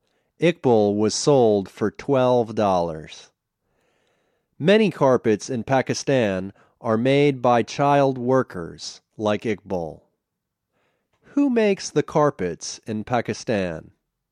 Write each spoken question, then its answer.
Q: Who makes the carpets in Pakistan?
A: They are made by child workers.